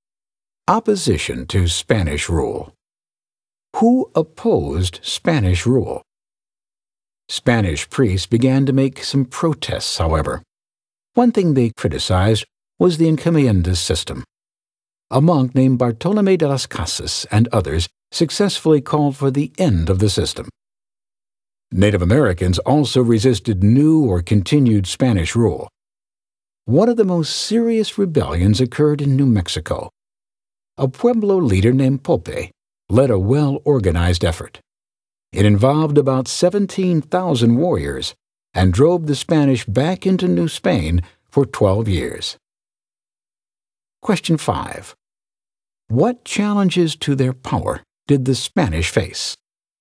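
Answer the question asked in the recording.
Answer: Protests from priests such as Las Casas and native revolts such as Popé's Pueblo rebellion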